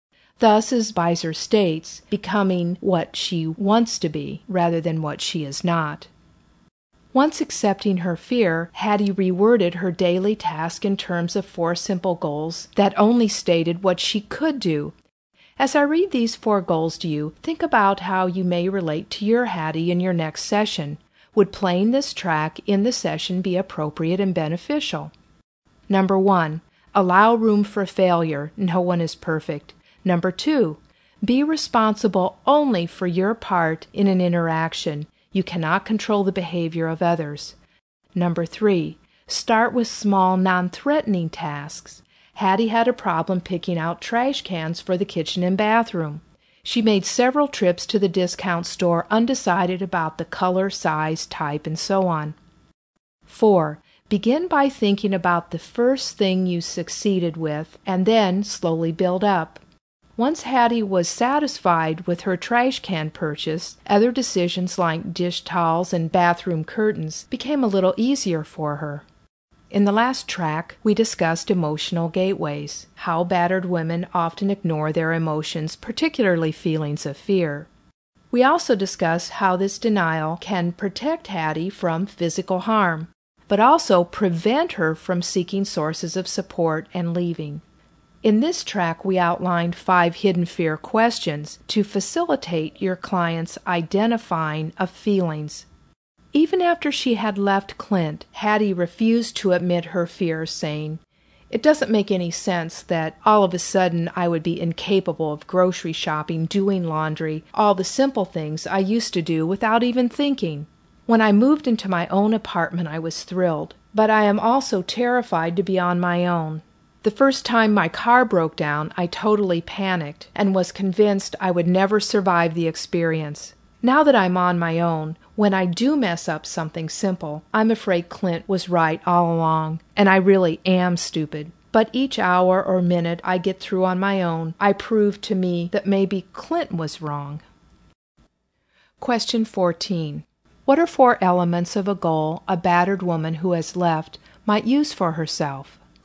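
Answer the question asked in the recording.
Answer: Allow room for failure; be responsible only for your part in an interaction; start with small, non-threatening tasks; begin with the first thing you succeeded with and slowly build up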